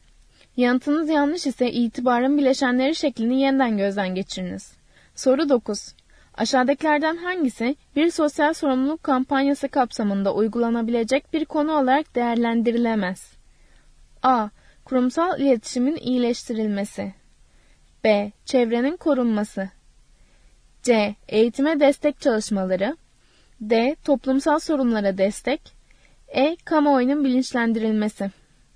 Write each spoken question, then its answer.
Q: Aşağıdakilerden hangisi bir sosyal sorumluluk kampanyası kapsamında uygulanabilecek bir konu olarak değerlendirilemez?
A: Doğru yanıt A şıkkı. Kurumsal iletişimin iyileştirilmesi.